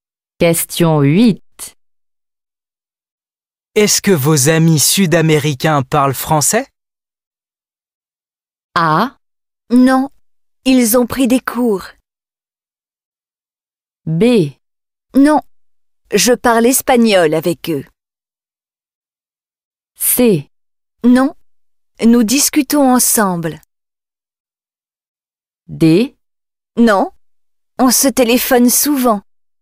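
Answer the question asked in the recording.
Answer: B: Non, je parle espagnol avec eux.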